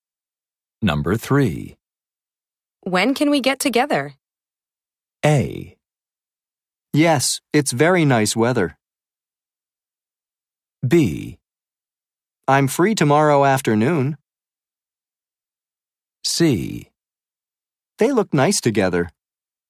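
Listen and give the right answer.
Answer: B: I'm free tomorrow afternoon.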